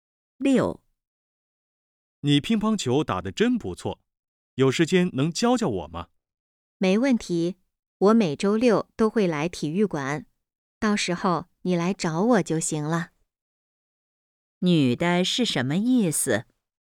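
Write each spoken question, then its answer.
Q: 女的是什么意思?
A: 愿意教他打乒乓球,周六去体育馆找她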